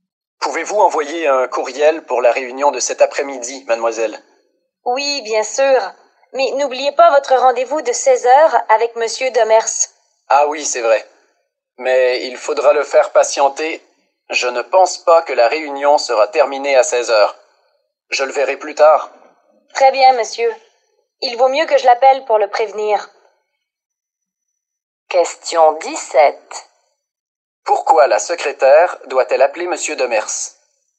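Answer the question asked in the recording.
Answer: Pour le prévenir que son patron sera en retard au rendez-vous de 16h, à cause de la réunion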